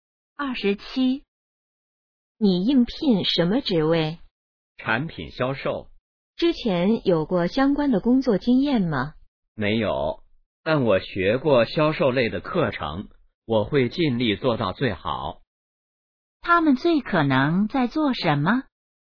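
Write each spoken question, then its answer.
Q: 他们最可能在做什么?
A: 面试(应聘)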